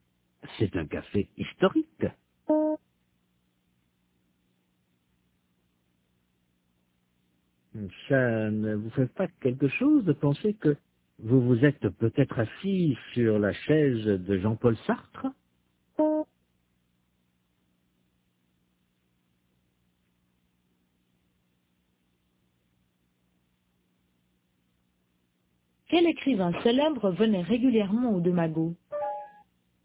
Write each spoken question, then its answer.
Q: Quel écrivain célèbre venait régulièrement aux deux magots?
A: Jean-Paul Sartre.